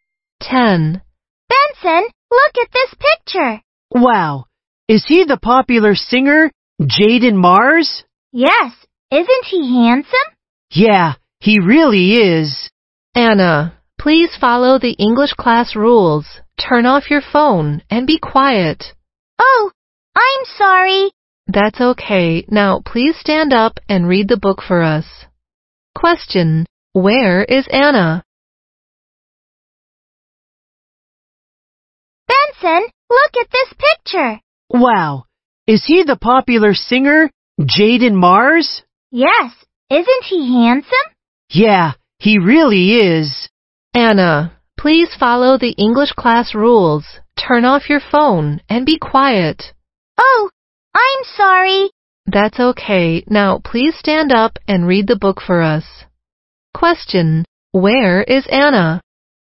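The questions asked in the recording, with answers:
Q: Where is Anna?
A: In English class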